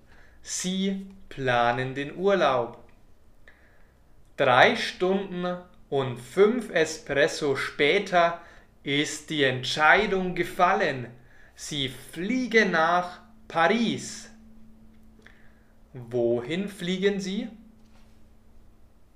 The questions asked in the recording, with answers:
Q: Wohin fliegen Sie?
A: Nach Paris. Sie fliegen nach Paris.